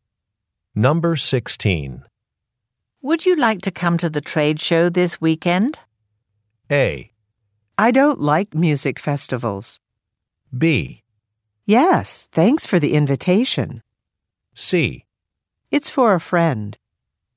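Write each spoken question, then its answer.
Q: Would you like to come to the trade show this weekend?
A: B: Yes, thanks for the invitation.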